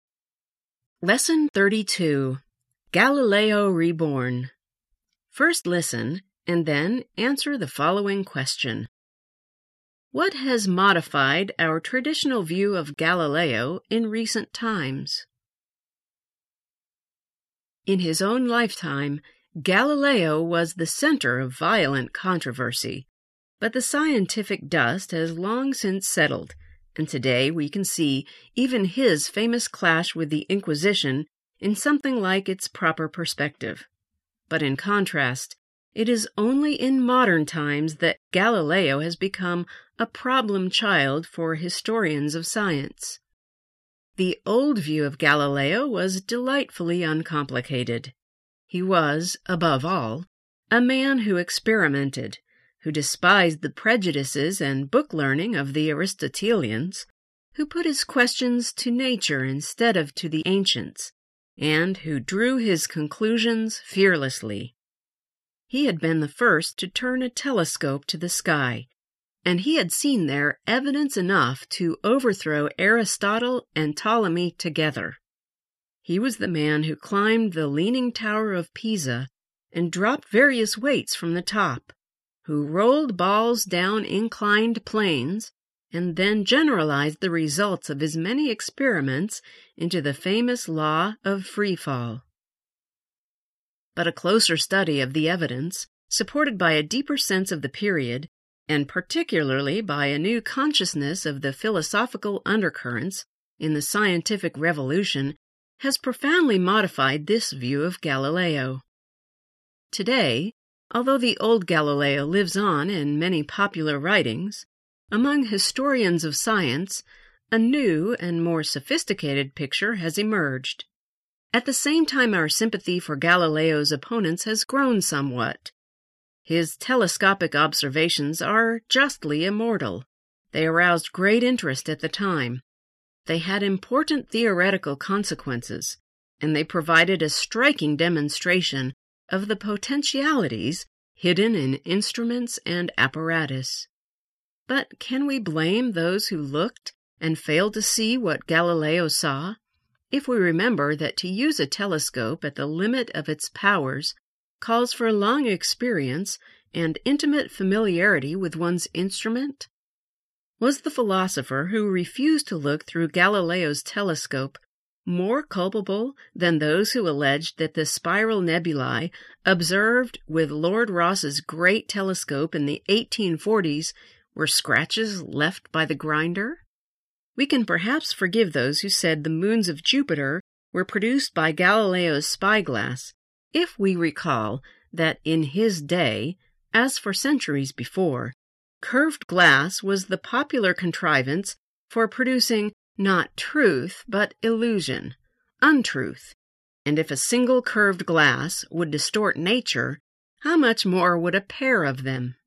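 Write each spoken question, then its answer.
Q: What has modified our traditional view of Galileo in recent times?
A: A closer study of the evidence, a deeper sense of the period, and a new awareness of the philosophical undercurrents in the scientific revolution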